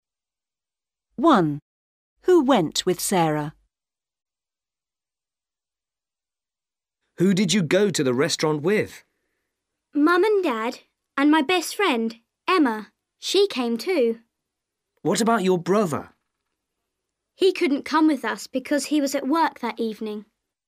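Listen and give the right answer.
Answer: Mum, Dad and her best friend Emma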